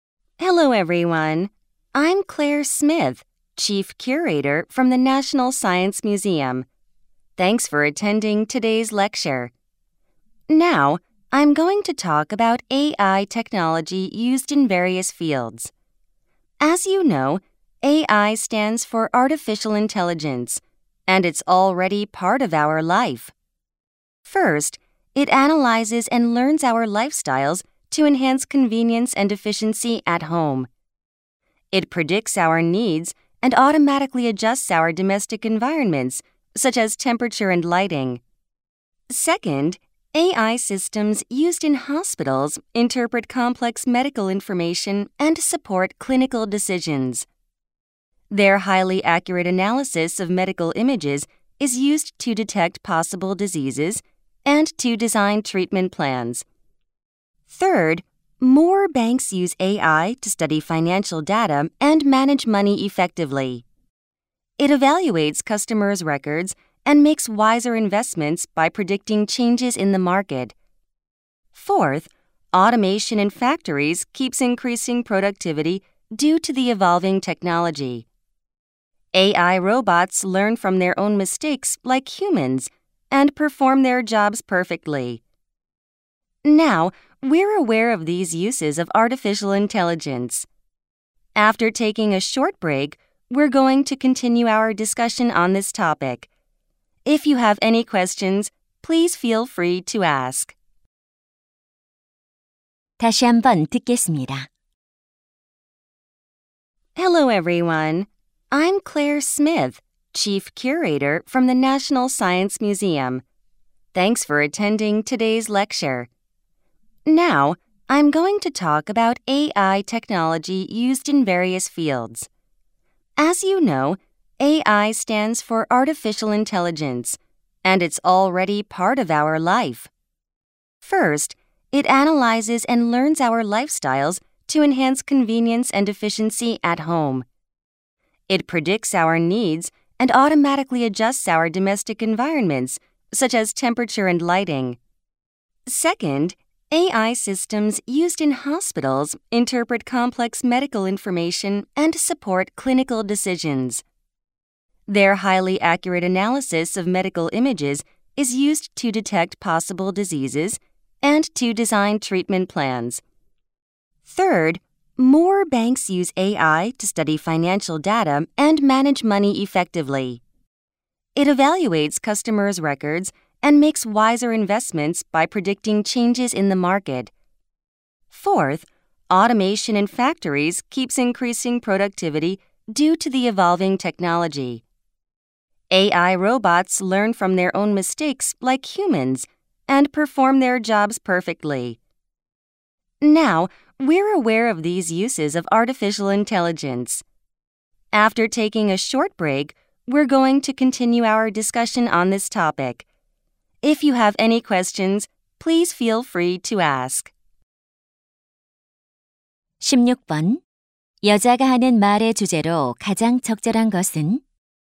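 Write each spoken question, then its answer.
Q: 여자가 하는 말의 주제로 가장 적절한 것은?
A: 다양한 분야에서 쓰이는 인공지능 기술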